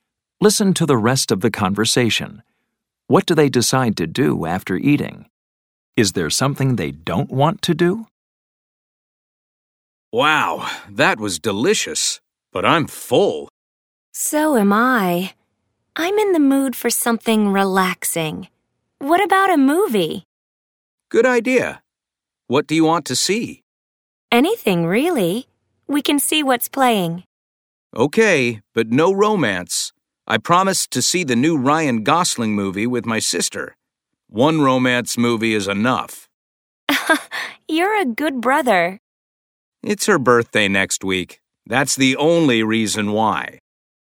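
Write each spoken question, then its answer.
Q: What do they decide to do after eating?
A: See a movie

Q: Is there something they don't want to do?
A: Yes, they don't want to see a romance movie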